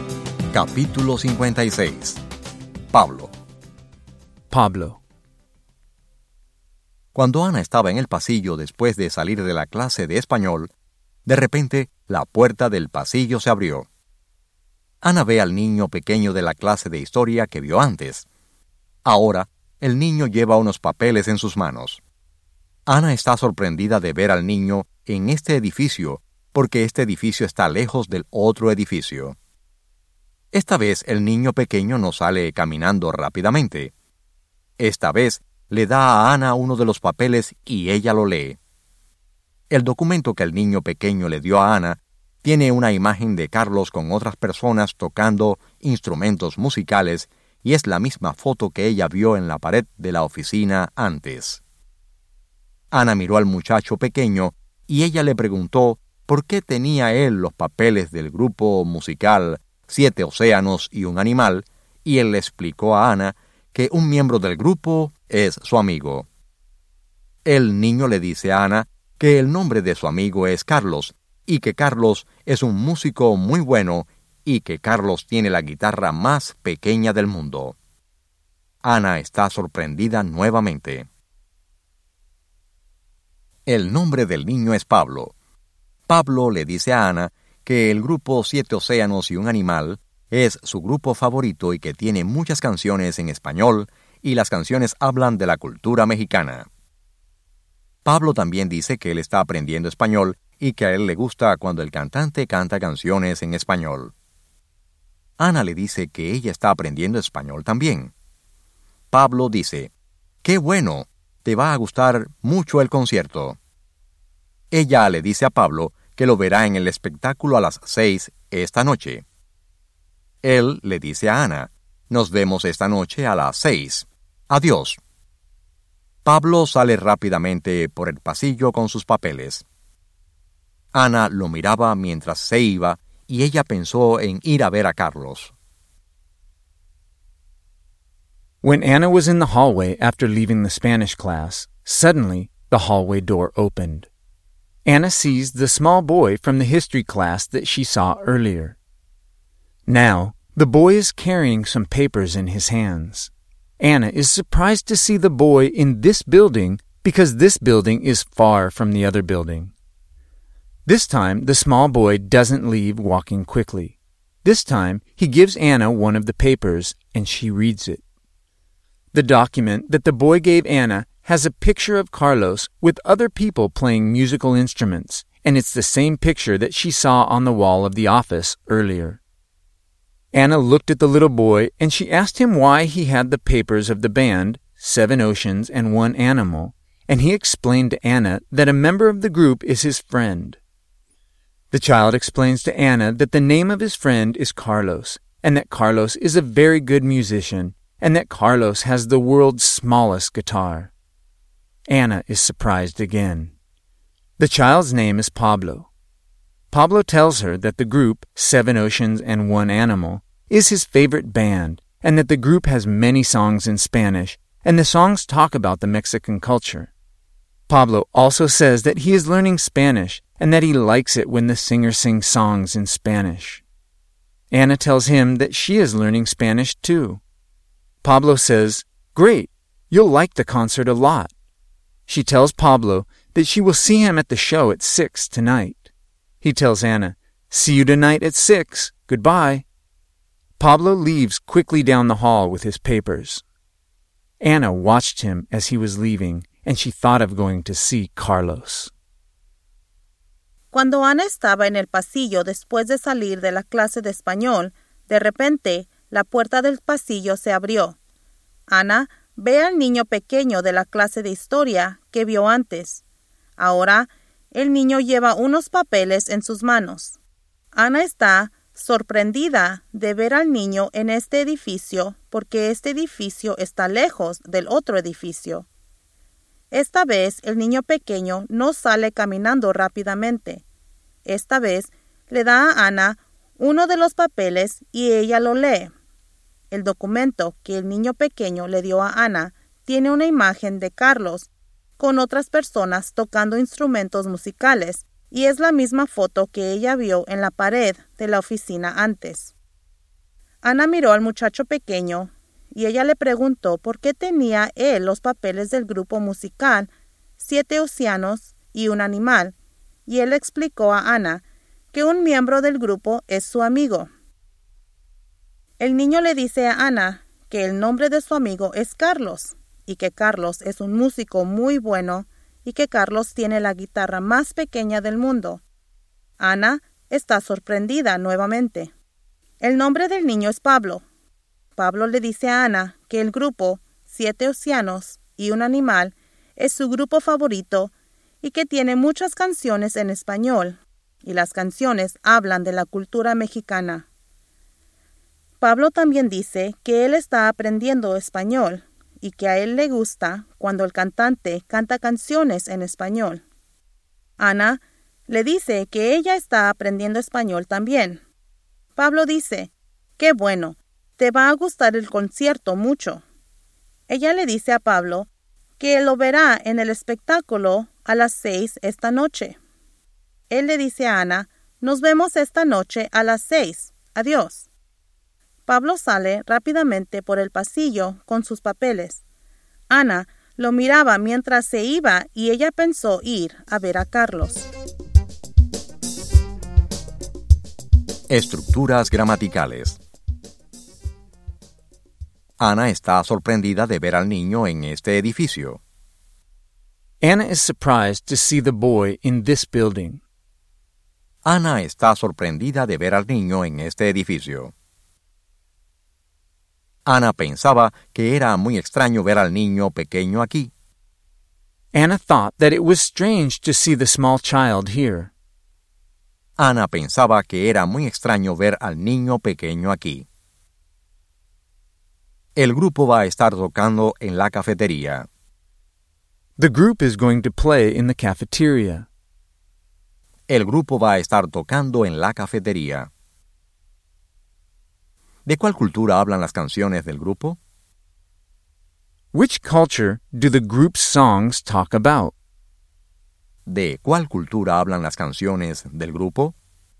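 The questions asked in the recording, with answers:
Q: ¿De cuál cultura hablan las canciones del grupo?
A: De la cultura mexicana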